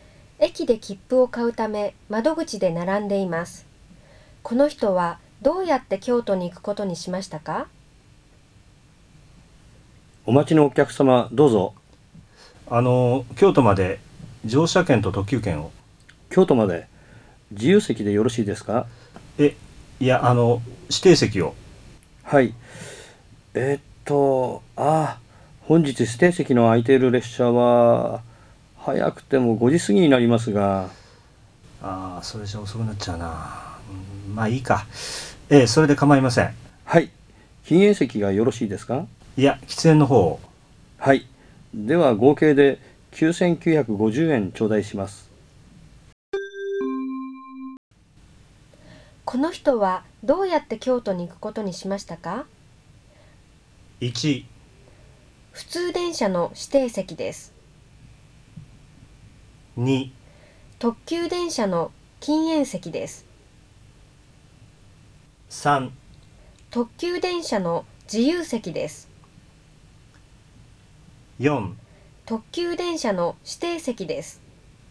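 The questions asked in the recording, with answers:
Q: この人はどうやって京都に行くことにしましたか?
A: 4: 特急電車の指定席です。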